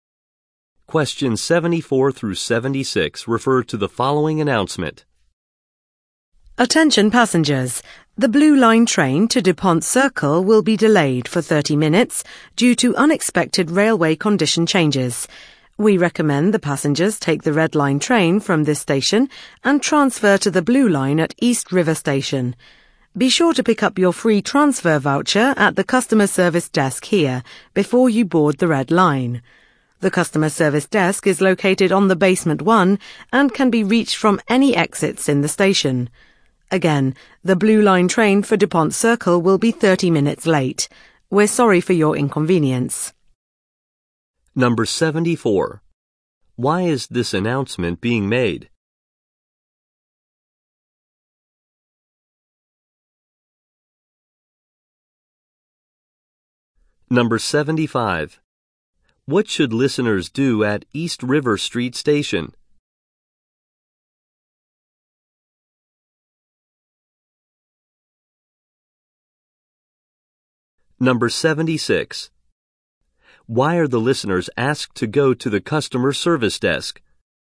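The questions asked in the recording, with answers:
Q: Why is this announcement being made?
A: The Blue Line train is delayed

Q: What should listeners do at East River Street Station?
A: Transfer to the Blue Line

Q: Why are the listeners asked to go to the customer service desk?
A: To pick up a free transfer voucher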